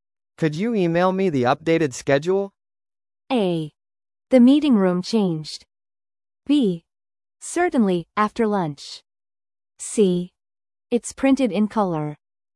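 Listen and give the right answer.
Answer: B: Certainly, after lunch.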